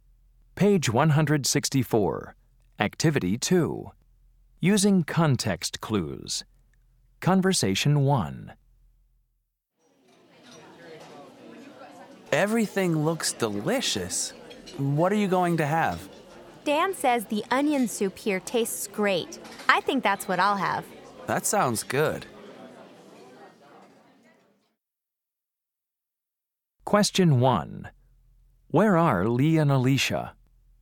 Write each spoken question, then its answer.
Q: Where are Lee and Alicia?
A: You know, it's really nice to eat in a restaurant.